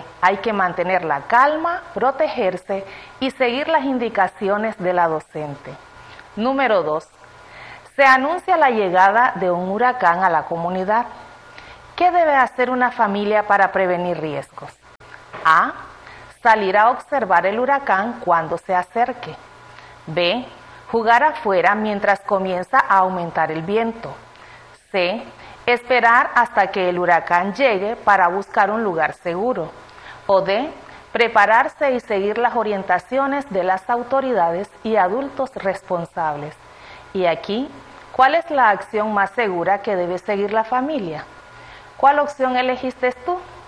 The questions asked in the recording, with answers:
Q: ¿Qué debe hacer una familia para prevenir riesgos?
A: Exacto, es la opción D. La familia debe prepararse y seguir las orientaciones de las autoridades y adultos responsables.